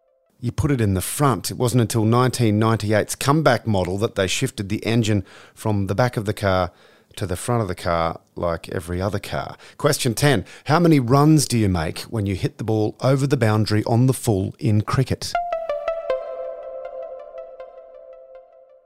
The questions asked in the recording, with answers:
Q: How many runs do you make when you hit the ball over the boundary on the full in cricket?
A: 6 runs.